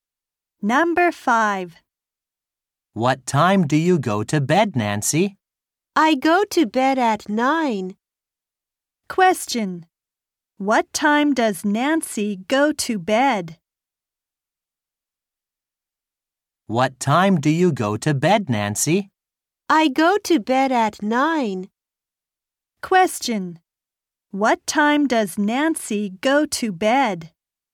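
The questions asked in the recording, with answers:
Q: What time does Nancy go to bed?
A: At 9.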